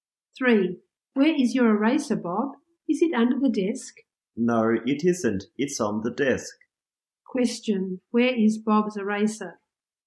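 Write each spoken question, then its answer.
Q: Question, where is Bob's eraser?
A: On the desk.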